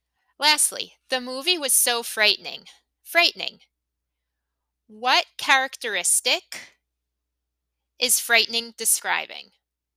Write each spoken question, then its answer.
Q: What characteristic is frightening describing?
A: It's describing the movie.